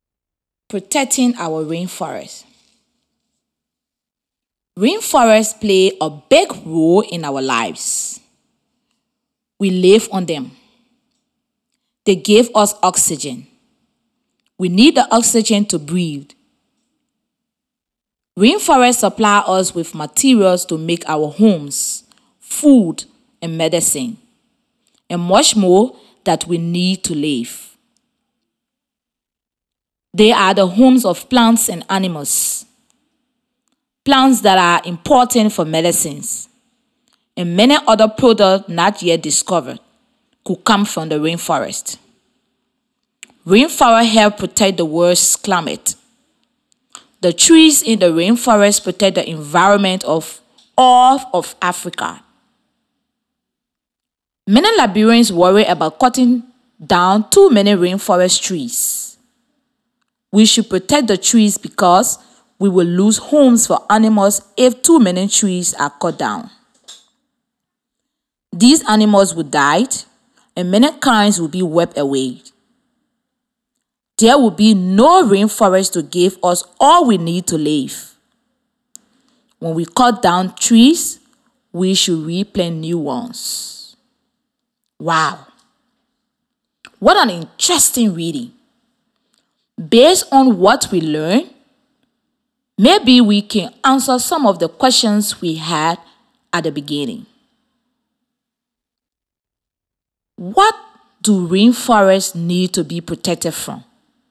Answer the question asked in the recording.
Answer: Trees need to be protected from being cut down.